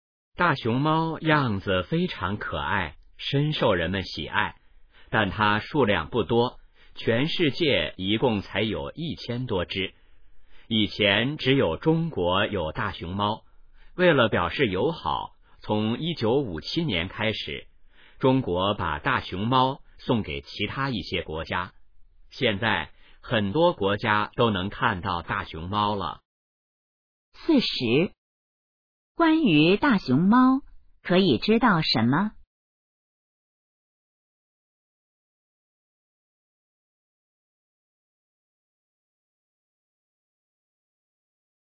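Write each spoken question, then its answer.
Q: 中国为什么要送大熊猫出国?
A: 为了表示友好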